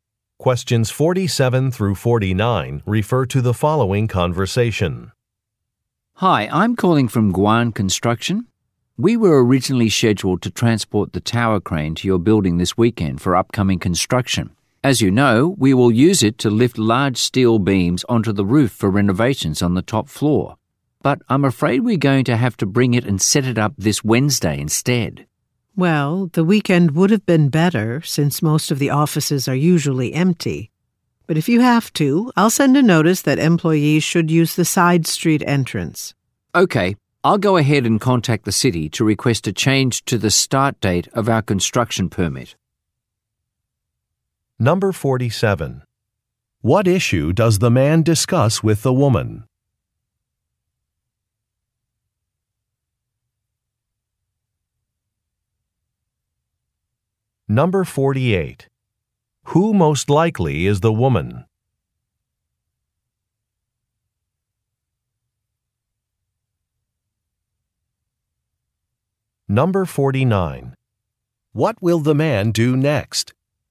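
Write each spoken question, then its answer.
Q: What issue does the man discuss with the woman?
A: The crane delivery moved to Wednesday

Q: What will the man do next?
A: Contact the city to change the permit start date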